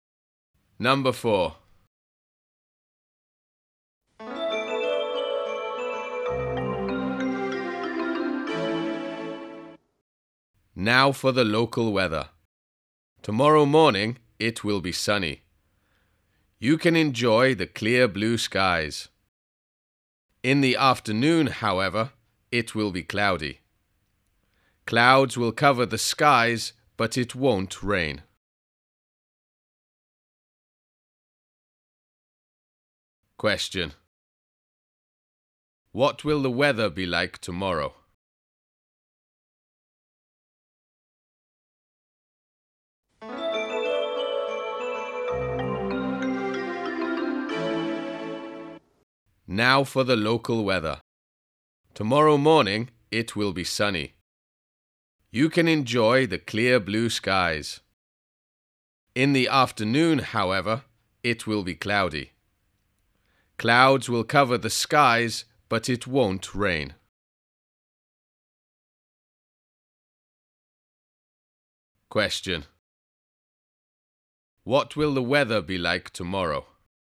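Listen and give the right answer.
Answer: Sunny in the morning, cloudy in the afternoon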